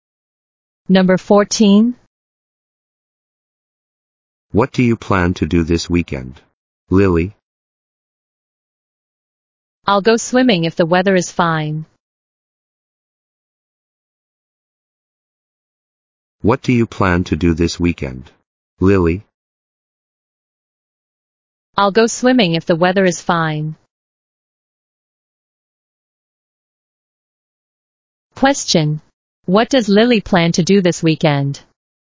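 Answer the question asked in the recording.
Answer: Go swimming if the weather is fine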